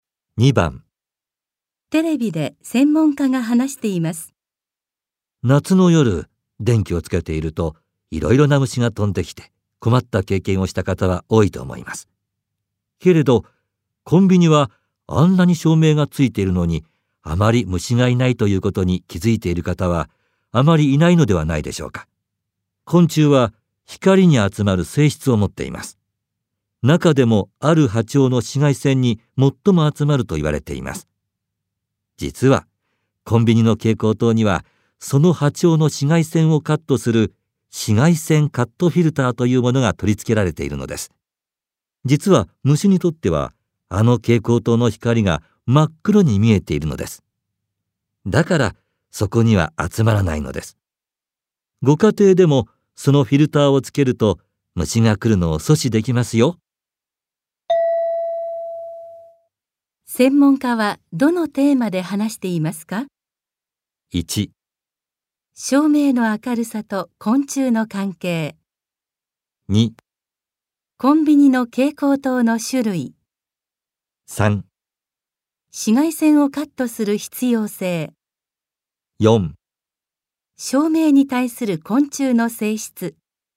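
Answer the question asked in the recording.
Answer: 4: 照明に対する昆虫の性質。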